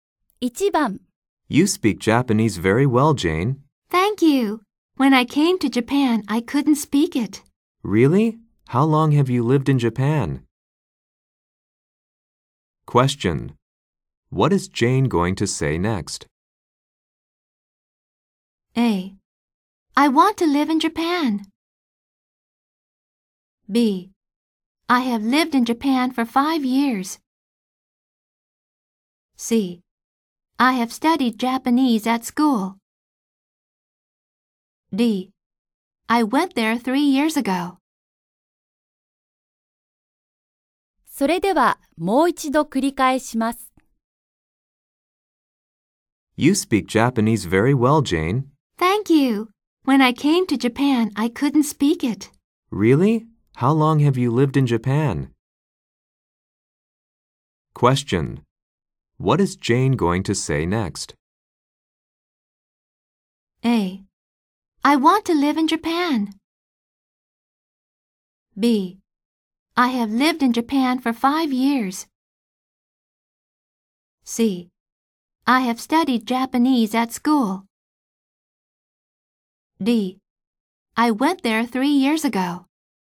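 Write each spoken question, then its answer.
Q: What is Jane going to say next?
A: B: I have lived in Japan for 5 years.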